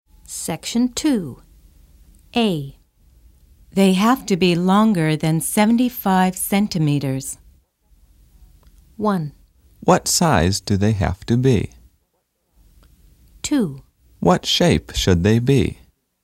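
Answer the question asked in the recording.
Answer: 1: What size do they have to be?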